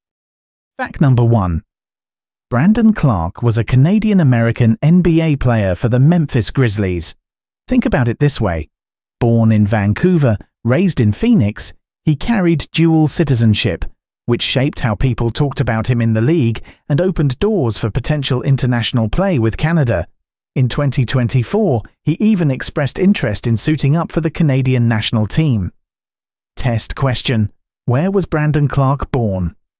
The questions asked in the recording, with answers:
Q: Where was Brandon Clark born?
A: Correct answer. Vancouver.